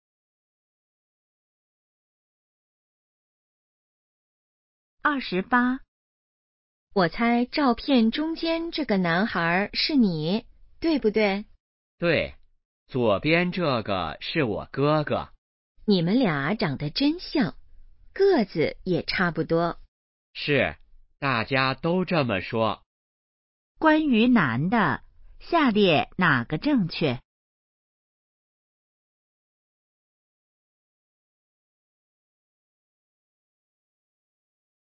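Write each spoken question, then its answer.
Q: 关于男的,下列哪个正确?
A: 和哥哥长得很像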